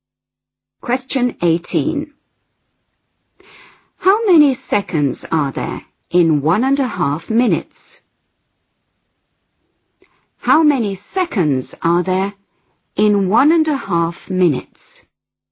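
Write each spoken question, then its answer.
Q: How many seconds are there in 1.5 minutes?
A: 90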